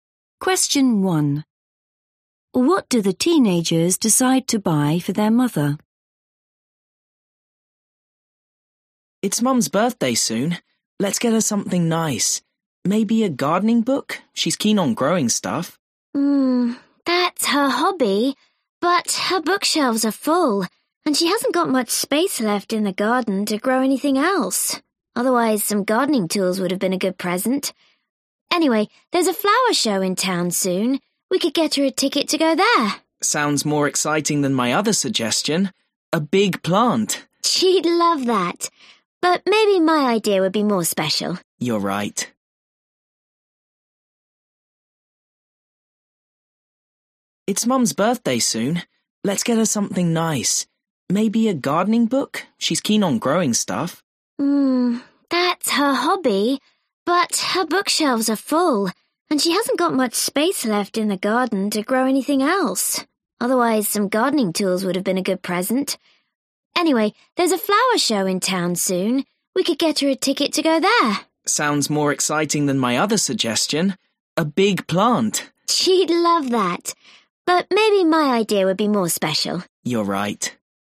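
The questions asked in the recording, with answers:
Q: What do the teenagers decide to buy for their mother?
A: a ticket to the flower show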